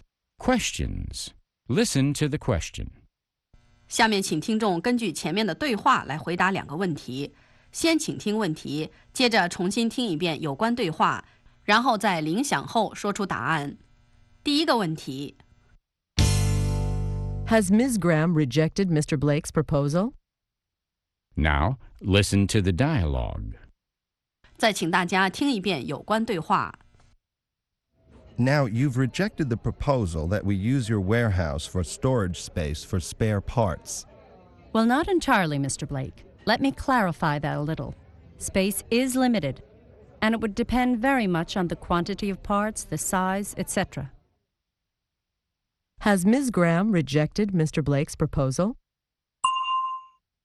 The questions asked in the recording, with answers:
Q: Has Ms. Graham rejected Mr. Blake's proposal?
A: No, she hasn't. She is still willing to consider it.